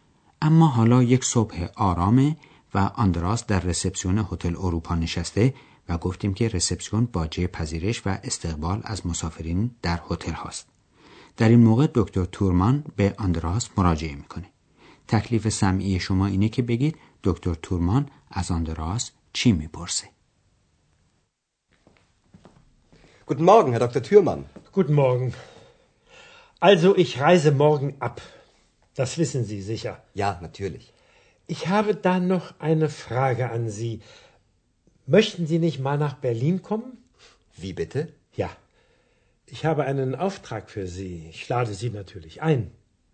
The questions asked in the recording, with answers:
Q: تکلیف سمعی شما اینه که بگید دکتر تورمان از آندراس چی میپرسه؟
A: از آندراس میپرسه که آیا ملدار زمانی سفری به برلین بکنه